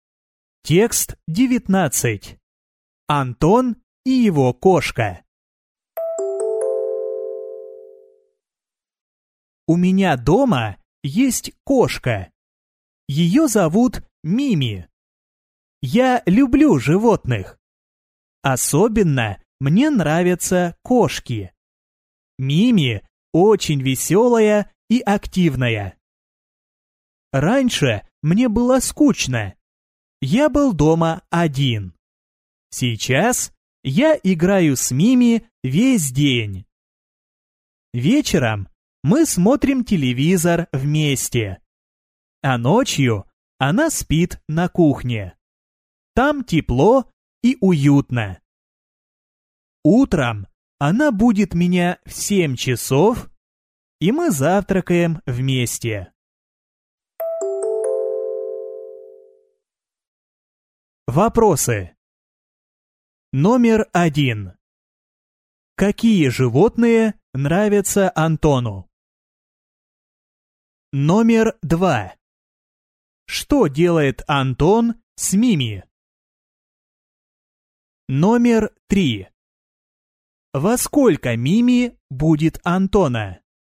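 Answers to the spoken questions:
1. Кошки
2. Играет с ней весь день, вечером смотрит с ней телевизор, утром завтракает вместе
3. В 7 часов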